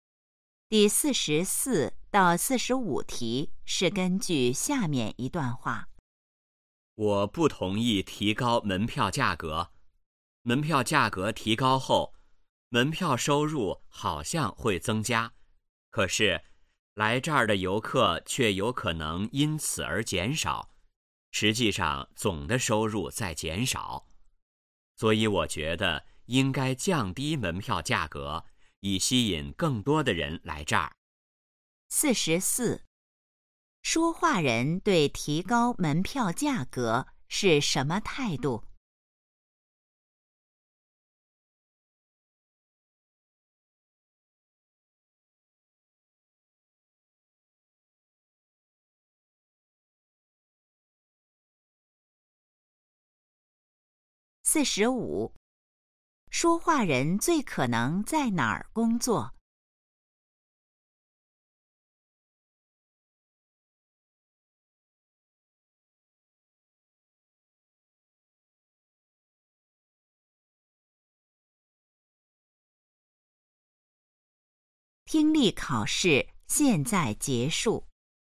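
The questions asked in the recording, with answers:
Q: 说话人对提高门票价格是什么态度?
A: 不同意(反对)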